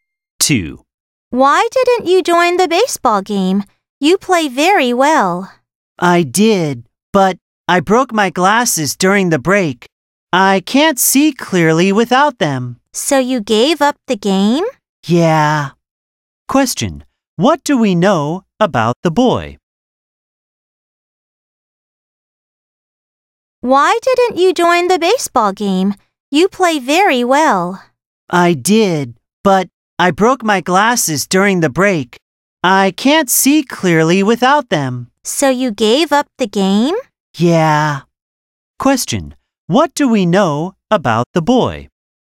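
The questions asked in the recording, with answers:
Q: What do we know about the boy?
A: He broke his glasses and gave up the baseball game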